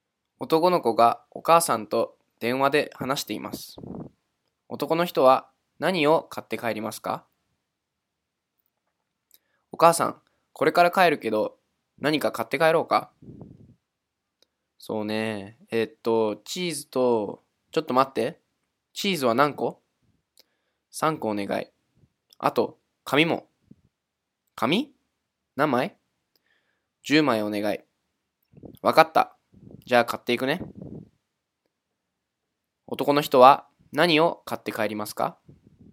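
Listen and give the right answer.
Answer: チーズ3個と紙10枚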